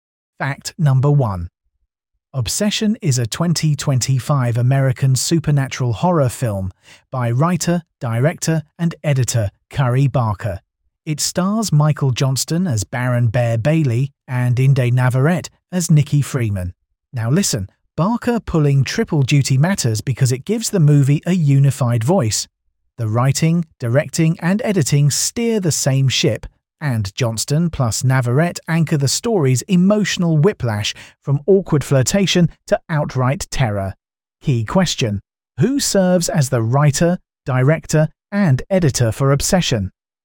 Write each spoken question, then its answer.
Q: who serves as the writer, director, and editor for Obsession?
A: Curry Barker